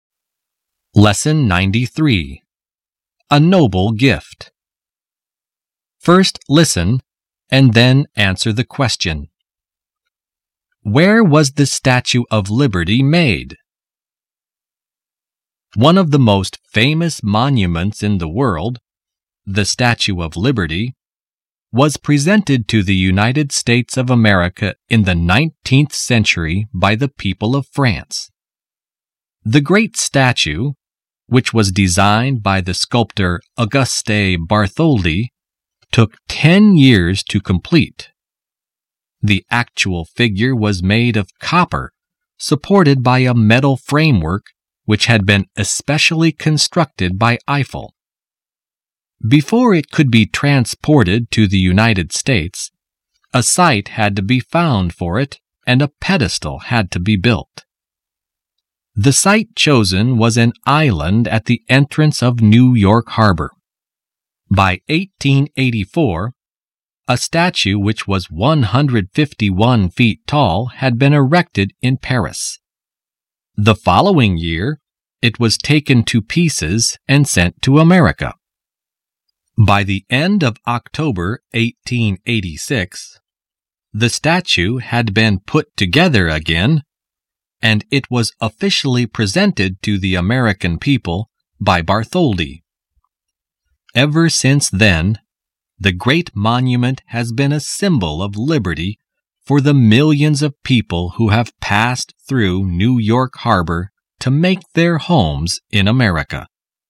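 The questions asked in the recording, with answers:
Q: Where was the Statue of Liberty made?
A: In Paris, France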